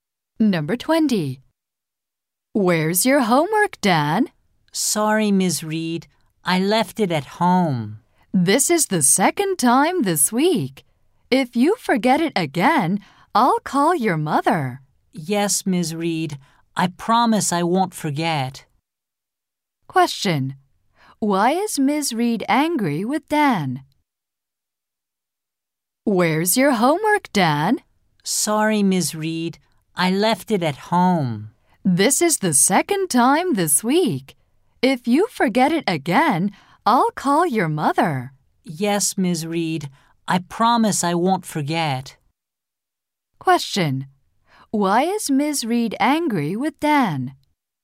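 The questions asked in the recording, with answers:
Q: Question. Why is Ms. Reed angry with Dan?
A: He forgot his homework again.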